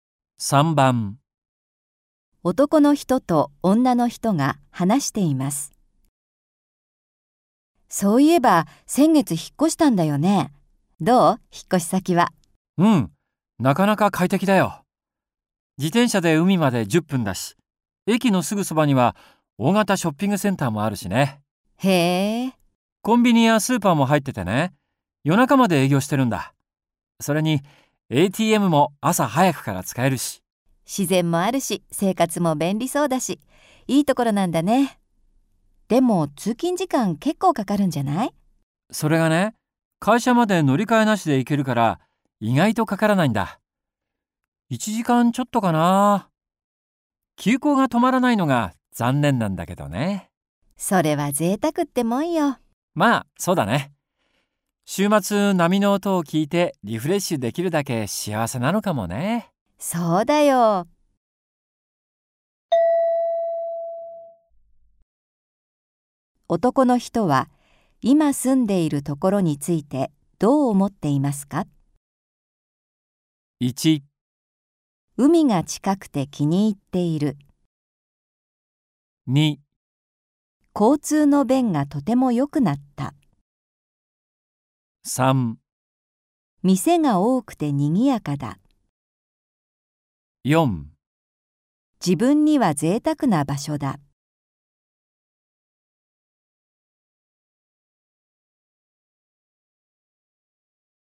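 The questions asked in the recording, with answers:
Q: 男の人は今住んでいるところについてどう思っていますか?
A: 1: 海が近くて気に入っている。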